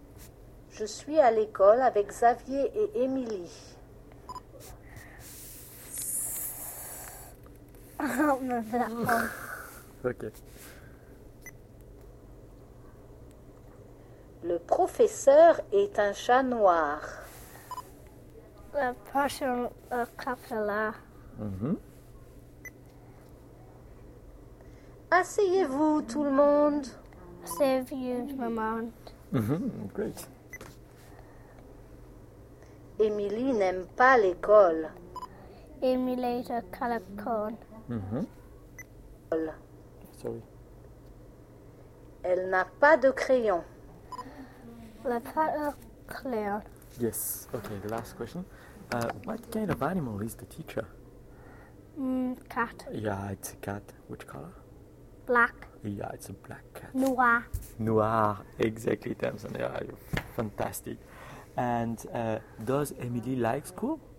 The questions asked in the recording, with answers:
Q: What kind of animal is the teacher?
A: Yeah, it's a cat.

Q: And does Emily like school?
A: No, she doesn't like it.